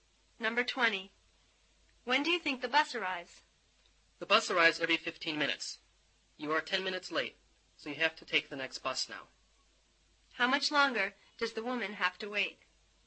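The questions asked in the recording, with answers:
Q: How much longer does the woman have to wait?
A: 5 minutes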